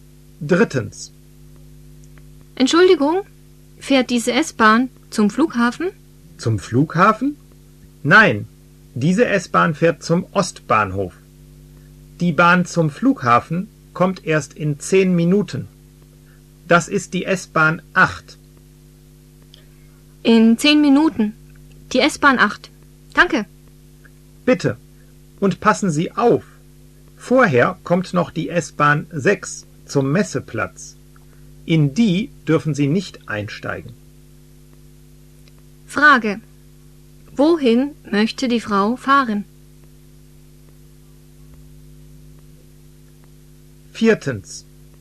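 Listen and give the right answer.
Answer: Zum Flughafen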